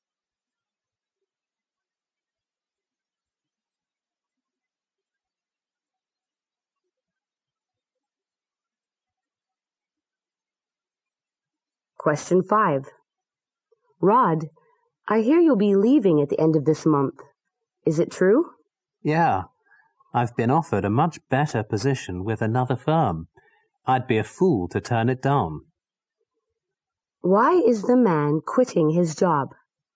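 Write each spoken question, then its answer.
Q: Why is the man quitting his job?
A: He has been offered a much better position with another firm.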